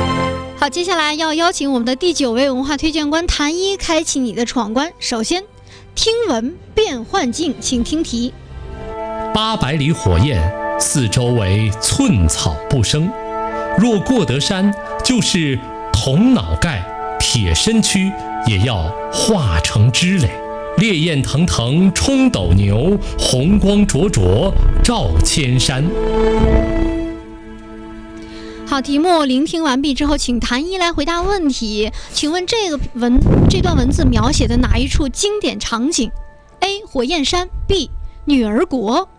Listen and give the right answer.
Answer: A. 火焰山。